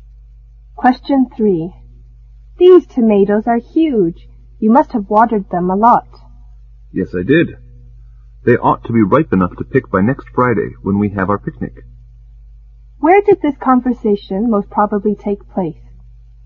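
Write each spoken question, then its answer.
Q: Where did this conversation most probably take place?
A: In a garden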